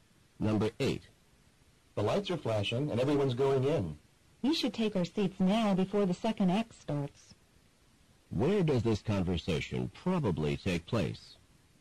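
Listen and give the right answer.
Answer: In a theater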